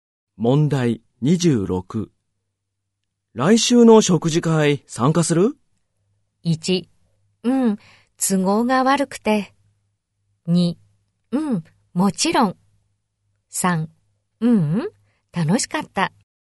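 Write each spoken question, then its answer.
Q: 来週の食事会参加する?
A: 1: うん、もちろん。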